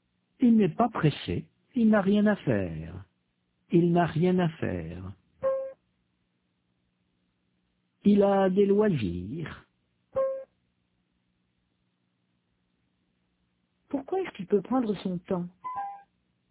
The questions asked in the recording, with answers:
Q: Pourquoi est-ce qu'il peut prendre son temps?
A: Parce qu'il n'est pas pressé, il n'a rien à faire.